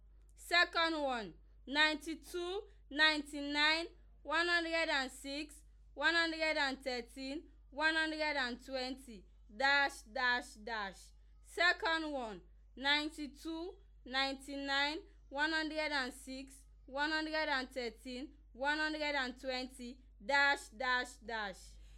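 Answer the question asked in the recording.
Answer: 127, 134, 141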